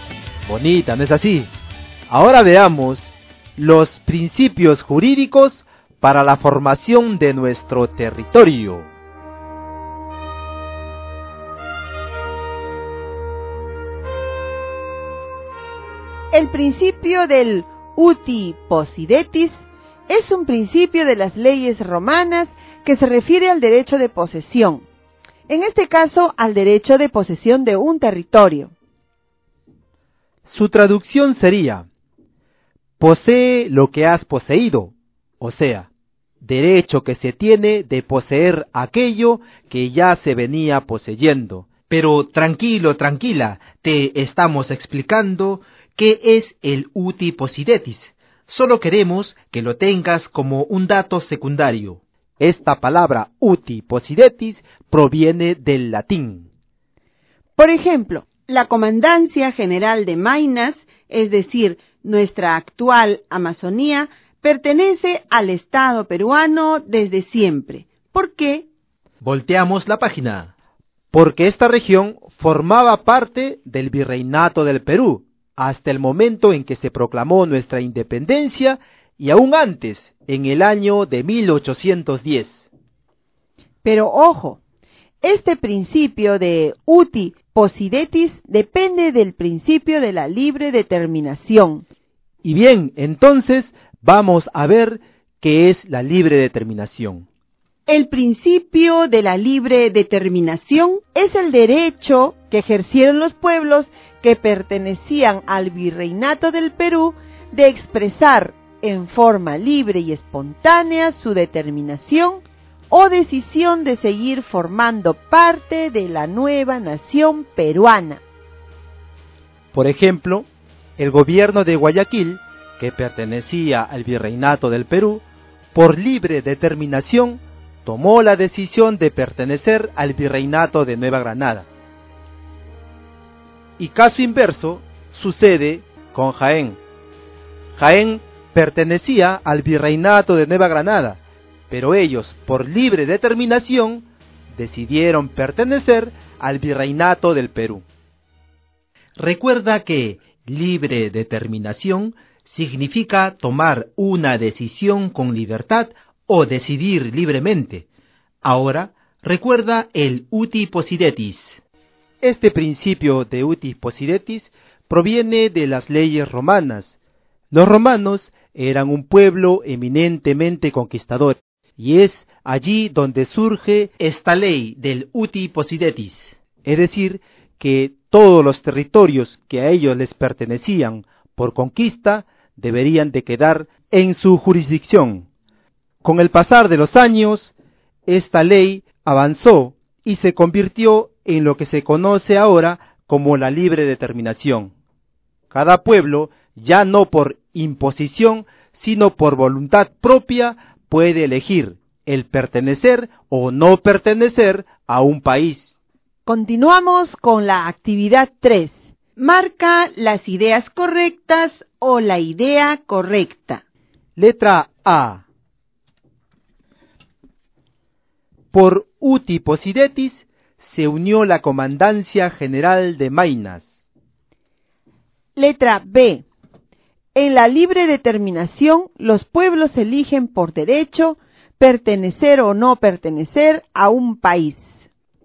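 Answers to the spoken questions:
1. Correcta
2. Correcta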